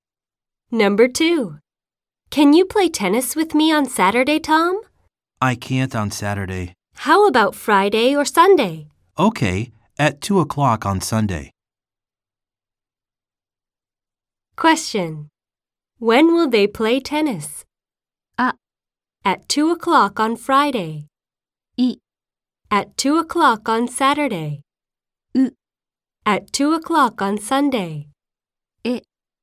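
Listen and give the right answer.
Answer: U: At 2 o'clock on Sunday.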